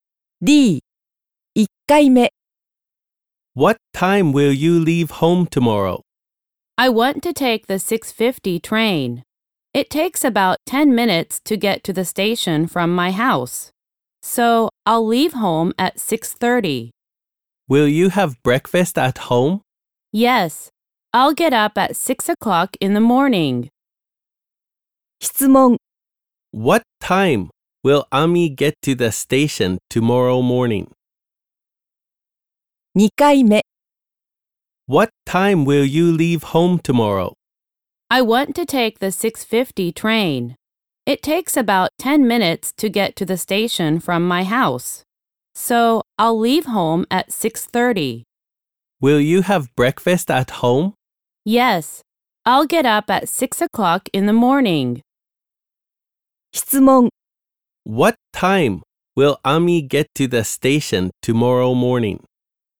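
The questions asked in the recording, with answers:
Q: What time will Ami get to the station tomorrow morning?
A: At 6:40.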